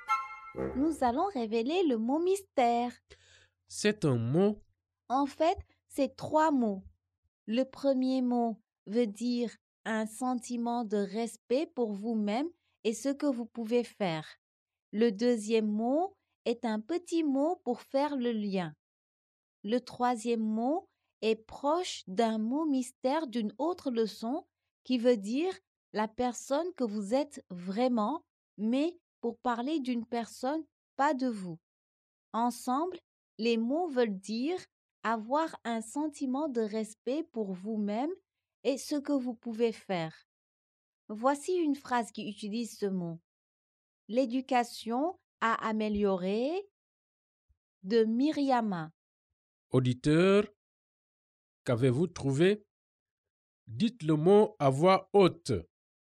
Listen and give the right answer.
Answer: Le mot mystère est estime de soi.